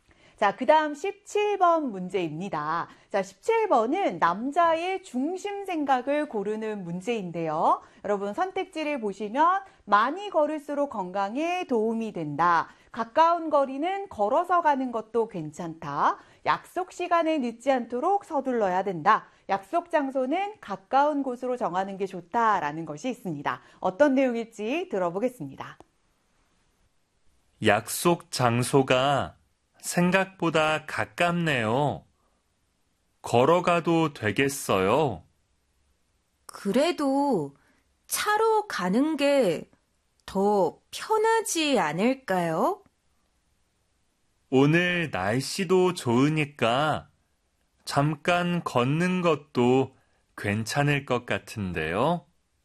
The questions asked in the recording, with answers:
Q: 자, 17번은 남자의 중심 생각을 고르는 문제인데요.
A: 그래서 17번의 정답은 2번이 되는 것이고요.